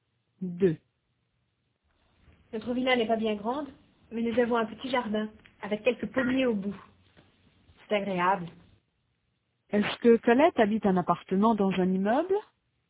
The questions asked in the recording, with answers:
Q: Est-ce que Colette habite un appartement dans un immeuble?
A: Non, elle habite dans une villa.